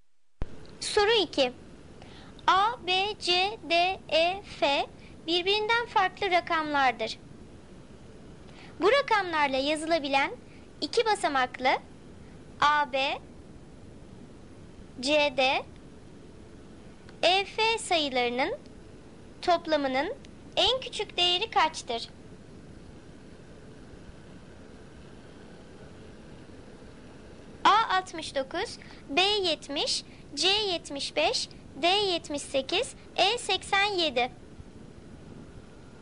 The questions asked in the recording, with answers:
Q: Bu rakamlarla yazılabilen iki basamaklı A, B, C, D, E, F sayılarının toplamının en küçük değeri kaçtır?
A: Doğru cevap A 69.